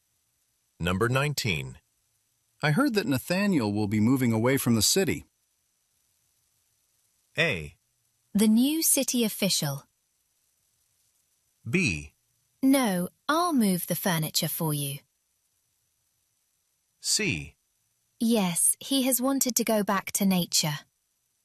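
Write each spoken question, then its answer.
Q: I heard that Nathaniel will be moving away from the city.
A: C: Yes, he has wanted to go back to nature.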